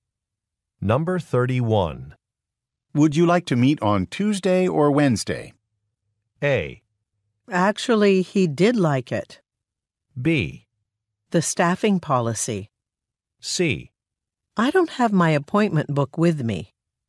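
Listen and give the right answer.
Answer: C: I don't have my appointment book with me.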